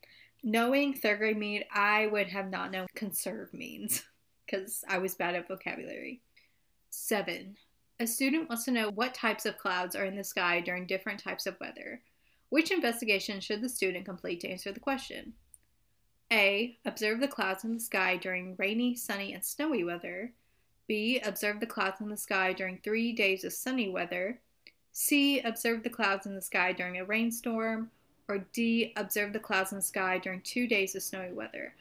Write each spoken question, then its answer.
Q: Which investigation should the student complete to answer the question?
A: So it's obviously A.